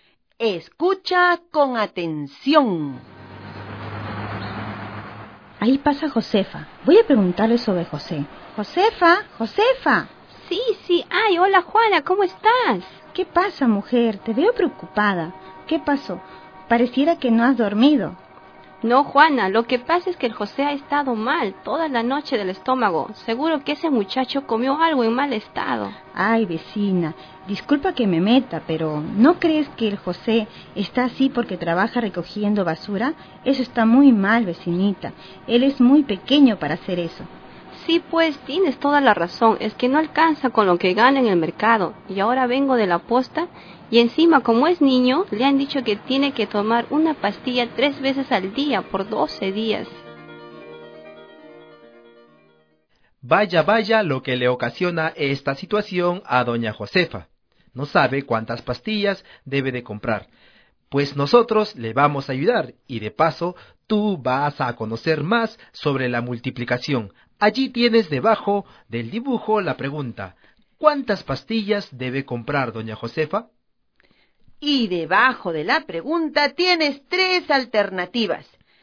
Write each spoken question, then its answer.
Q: ¿cuántas pastillas debe comprar doña Josefa?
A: Doña Josefa debe comprar 36 pastillas.